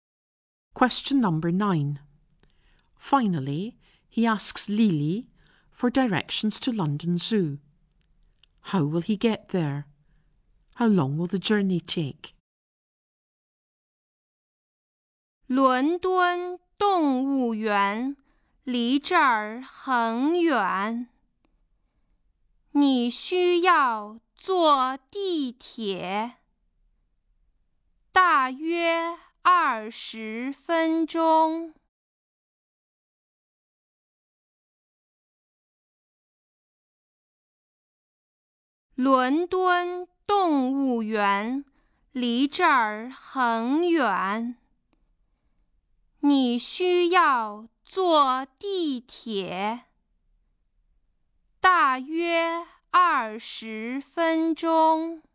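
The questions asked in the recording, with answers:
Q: How will he get there?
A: By underground (subway)

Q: How long will the journey take?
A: About 20 minutes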